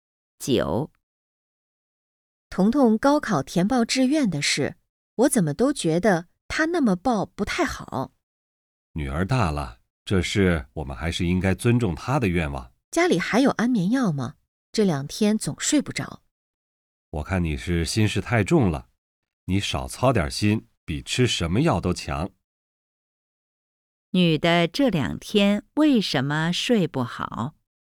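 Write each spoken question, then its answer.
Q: 女的这两天为什么睡不好?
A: 担心女儿填报志愿的事(心事太重)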